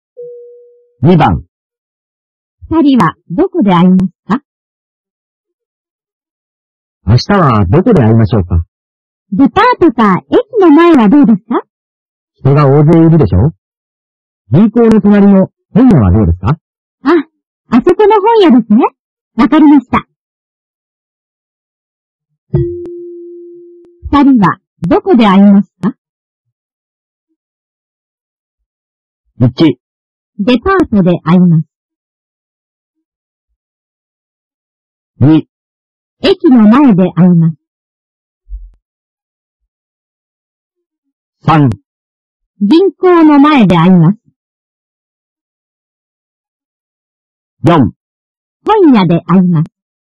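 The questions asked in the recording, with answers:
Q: 二人はどこで会いますか?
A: 4: 本屋で会います。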